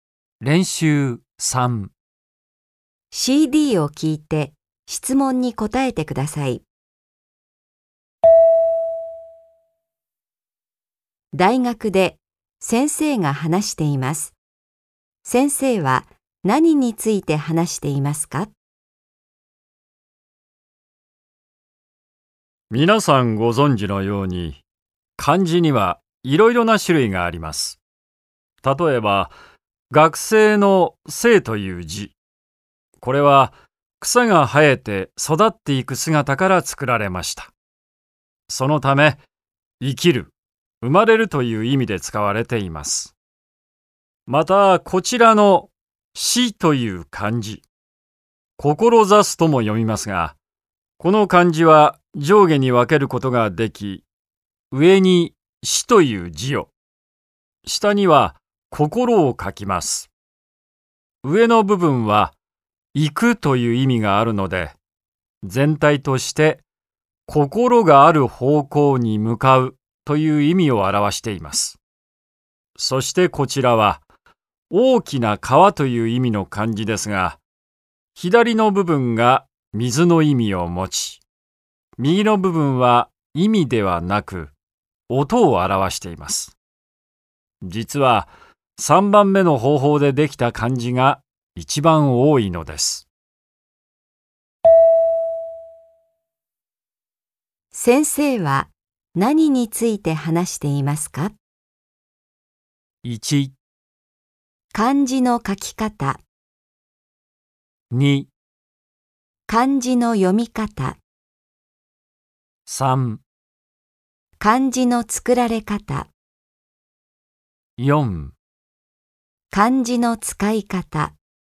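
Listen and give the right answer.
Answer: 3: 漢字の作られ方。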